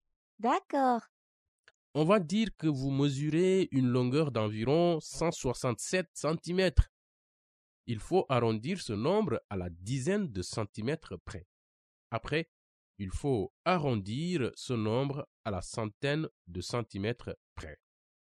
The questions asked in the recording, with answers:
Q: Il faut arrondir ce nombre à la dizaine de centimètres près.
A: Donc, en arrondi 167 à 170 cm.

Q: Après, il faut arrondir ce nombre à la centaine de centimètres près.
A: Donc, 167 arrondi à 100 centimètres près, c'est 200 centimètres.